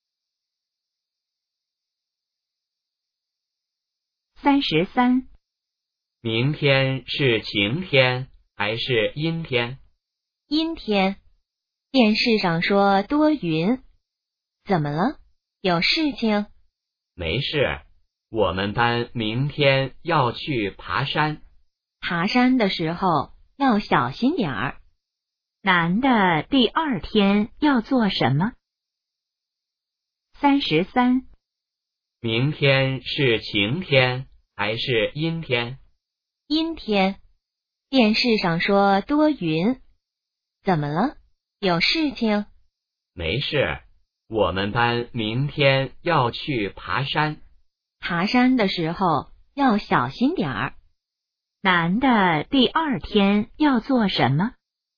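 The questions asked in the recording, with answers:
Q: 男的第二天要做什么?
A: 去爬山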